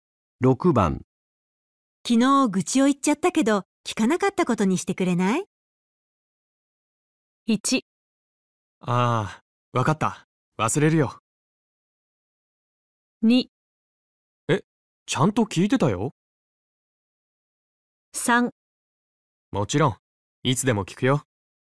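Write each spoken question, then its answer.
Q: 昨日愚痴を言っちゃったけど聞かなかったことにしてくれない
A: 1: ああ、わかった。忘れるよ。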